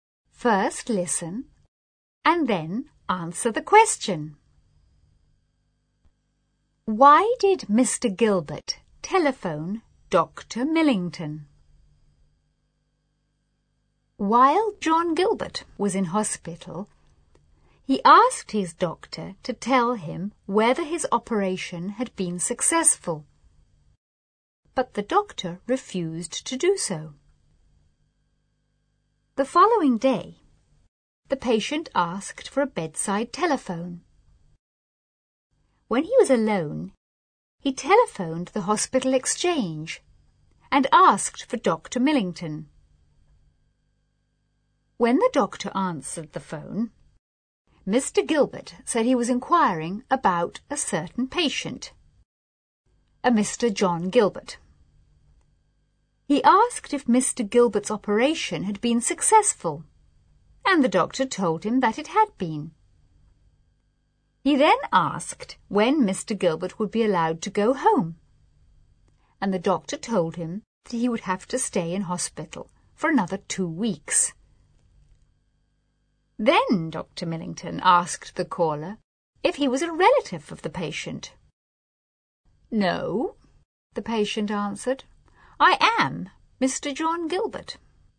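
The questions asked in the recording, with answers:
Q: Why did Mr. Gilbert telephone Dr. Millington?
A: To find out whether his operation had been successful, because the doctor wouldn't tell him directly.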